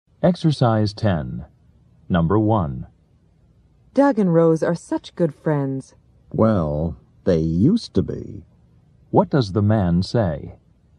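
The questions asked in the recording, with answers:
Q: What does the man say?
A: Doug and Rose are no longer good friends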